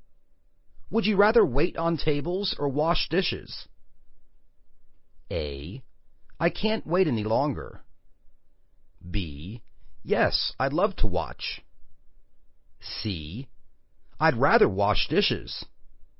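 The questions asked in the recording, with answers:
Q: Would you rather wait on tables or wash dishes?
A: C: I'd rather wash dishes.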